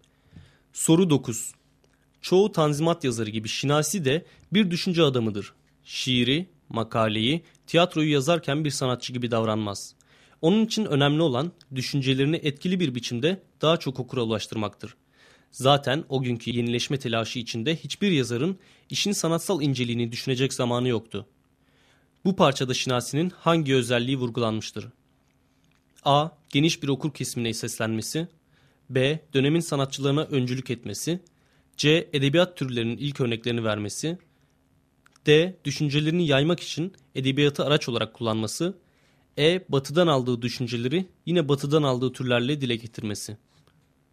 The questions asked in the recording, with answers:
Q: Bu parçada Şinasi'nin hangi özelliği vurgulanmıştır?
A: Doğru cevap D şıkkı.